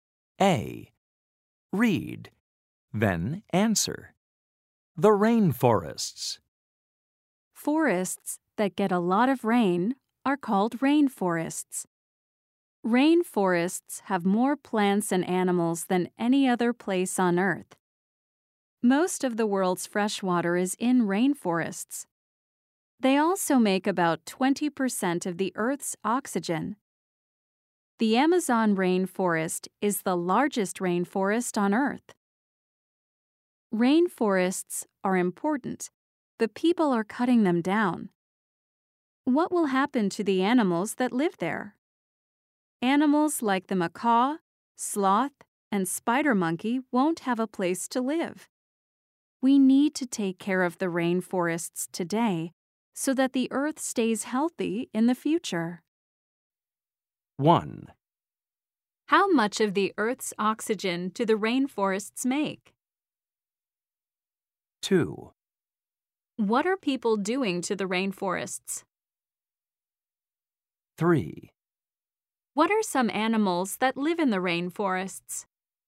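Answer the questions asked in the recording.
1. About 20%
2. Cutting them down
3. The macaw, sloth, and spider monkey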